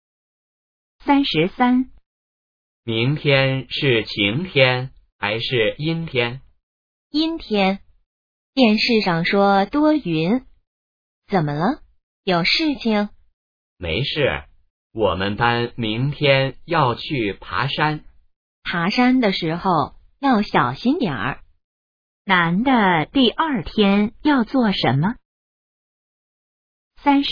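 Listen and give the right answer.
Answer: 去爬山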